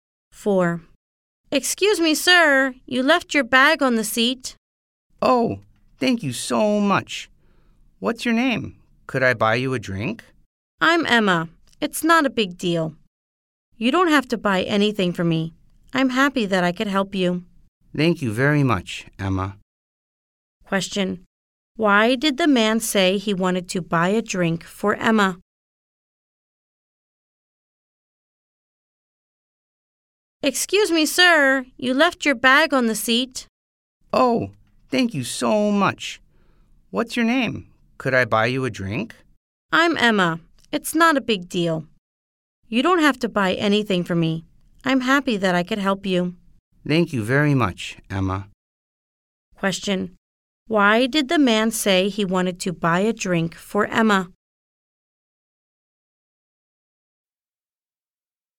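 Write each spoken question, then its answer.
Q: Why did the man say he wanted to buy a drink for Emma?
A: Because she told him he had left his bag on the seat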